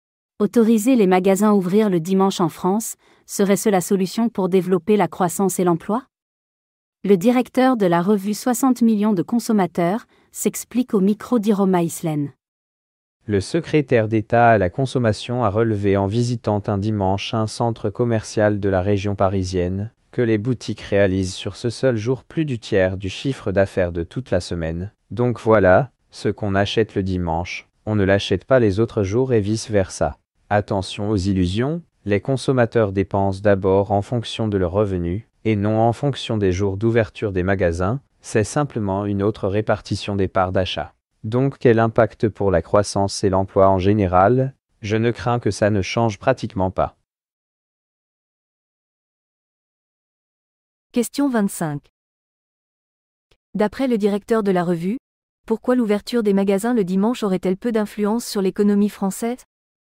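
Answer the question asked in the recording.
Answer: Parce que les consommateurs dépensent en fonction de leurs revenus : ce qu'on achète le dimanche, on ne l'achète pas les autres jours, c'est seulement une autre répartition des achats.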